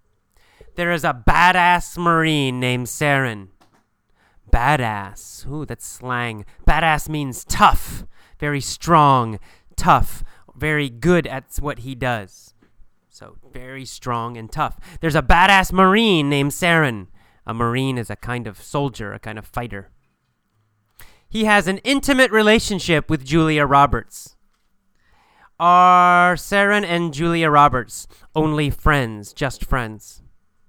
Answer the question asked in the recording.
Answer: No. They have an intimate relationship.